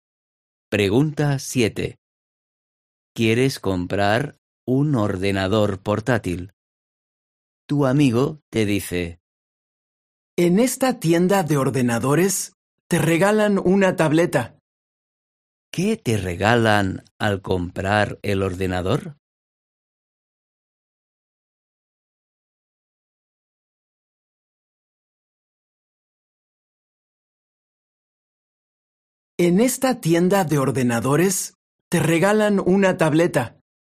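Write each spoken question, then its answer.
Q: ¿Qué te regalan al comprar el ordenador?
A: una tableta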